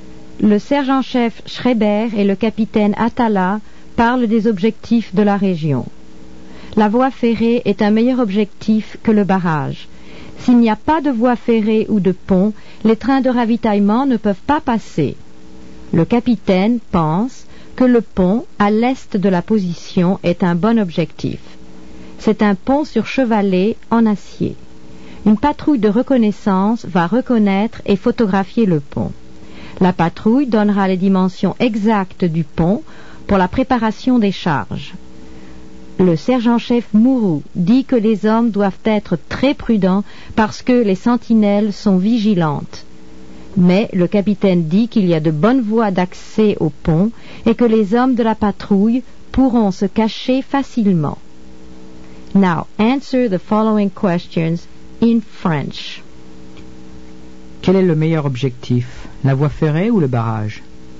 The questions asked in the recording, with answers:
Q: Quel est le meilleur objectif, la voie ferrée ou le barrage?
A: La voie ferrée est le meilleur objectif.